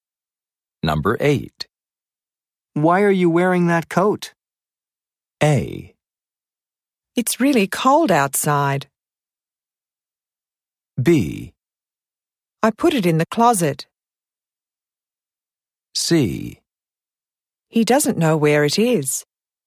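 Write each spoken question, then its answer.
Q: Why are you wearing that coat?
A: A: It's really cold outside.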